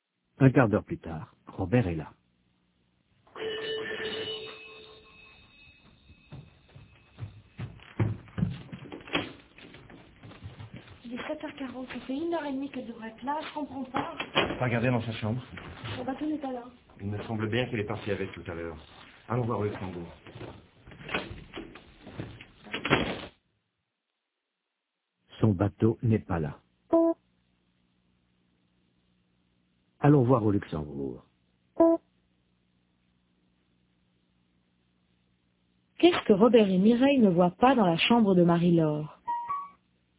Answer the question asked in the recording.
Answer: Son bateau.